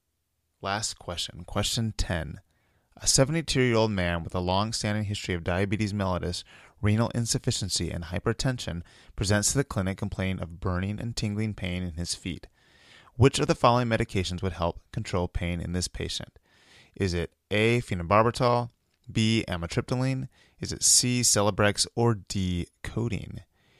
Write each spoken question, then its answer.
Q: Which of the following medications would help control pain in this patient?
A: The answer is B.